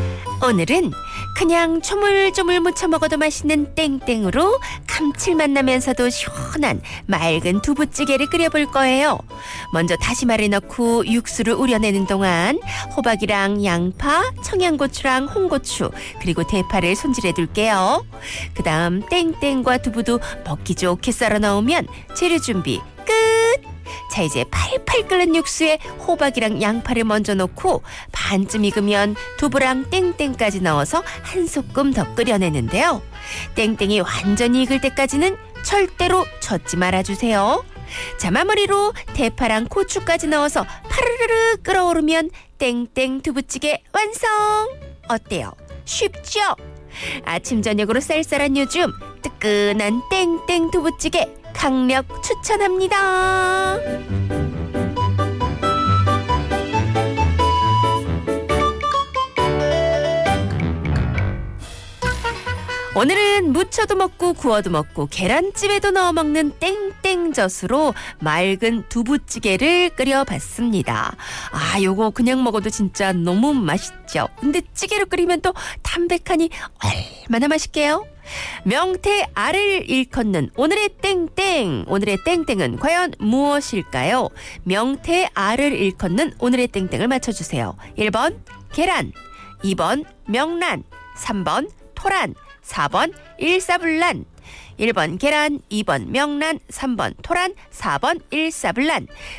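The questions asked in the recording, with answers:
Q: 명태 알을 일컫는 오늘의 땡땡을 맞춰주세요. 1번 계란, 2번 명란, 3번 토란, 4번 일사불란.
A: 2: 명란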